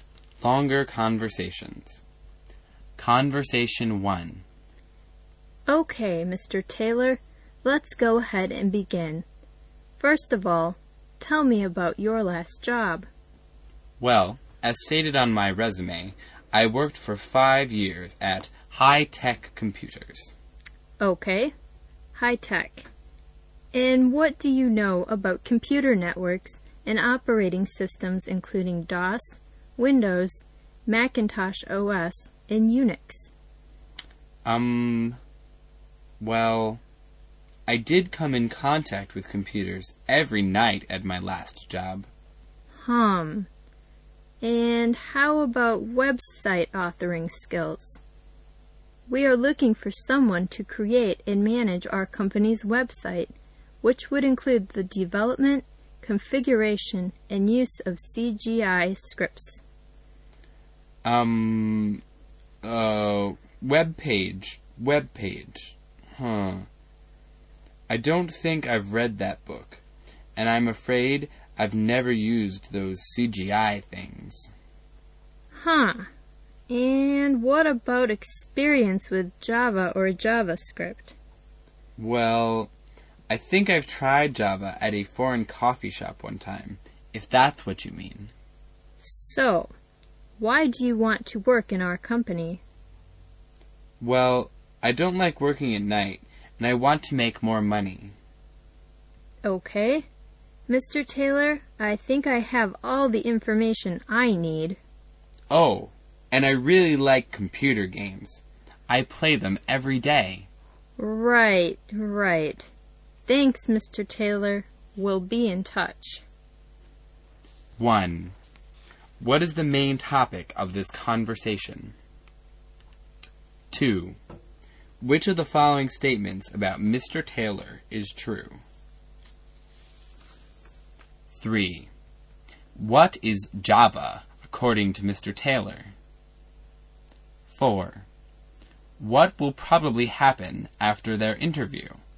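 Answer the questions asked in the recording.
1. A job interview
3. A kind of coffee
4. Mr. Taylor won't get the job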